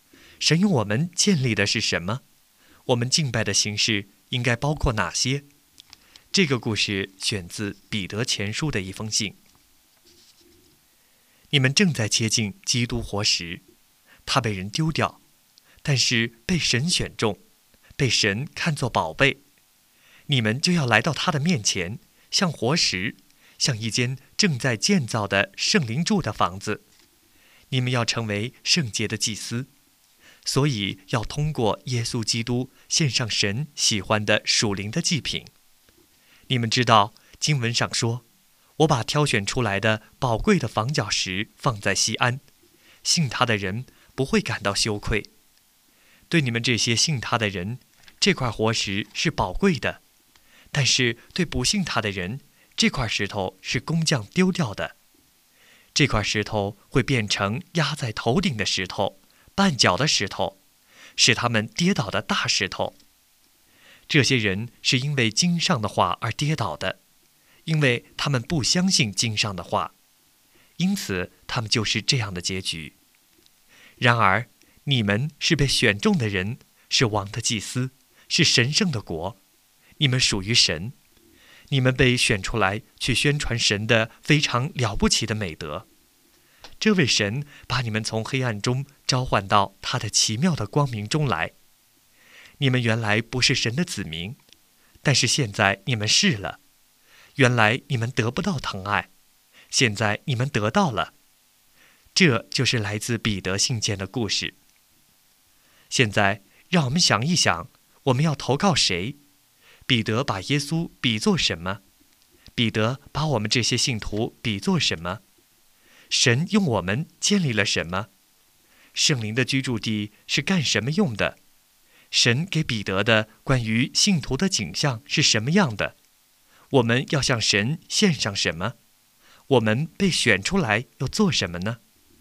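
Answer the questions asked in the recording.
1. 基督活石(耶稣基督)
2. 活石,宝贵的房角石
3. 活石
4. 一间圣灵住的房子
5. 神喜欢的属灵的祭品
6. 去宣传神的非常了不起的美德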